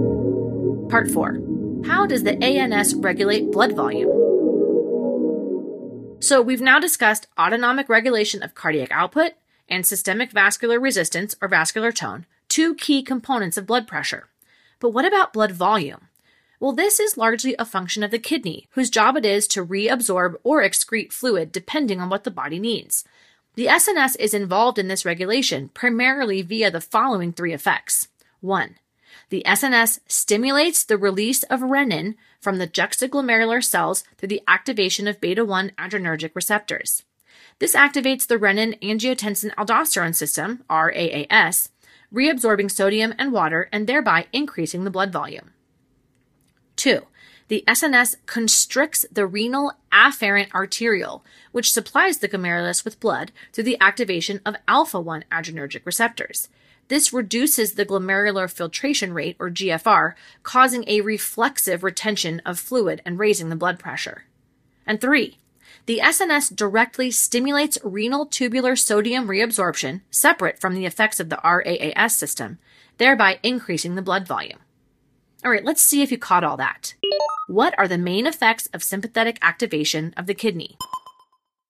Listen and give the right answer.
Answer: increased renin release, decreased glomerular filtration rate, and increased sodium reabsorption are the main effects of sympathetic activation of the kidney.